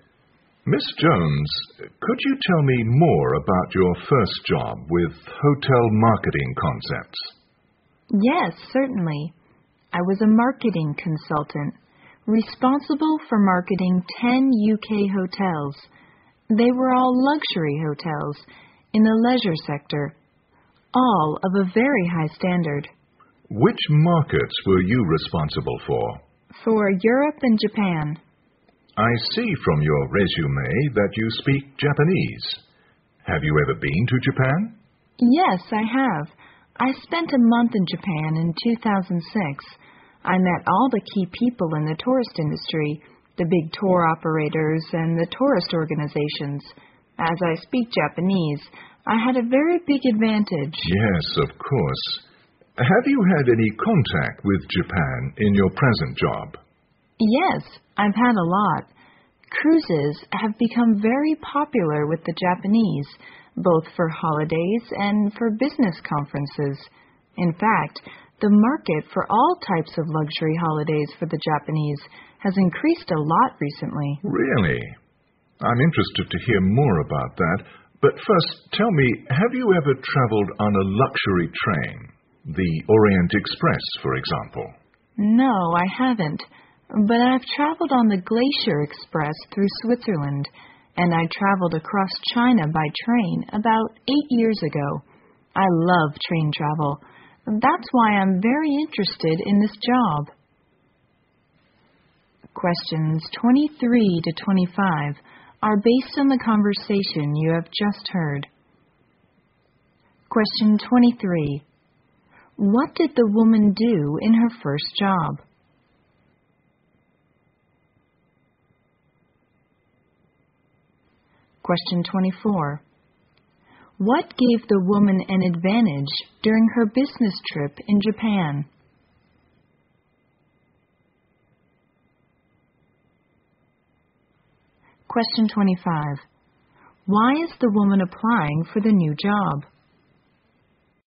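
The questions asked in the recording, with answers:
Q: What did the woman do in her first job?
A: She was a marketing consultant for 10 UK luxury hotels.

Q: What gave the woman an advantage during her business trip in Japan?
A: She speaks Japanese.

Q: Why is the woman applying for the new job?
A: She loves train travel.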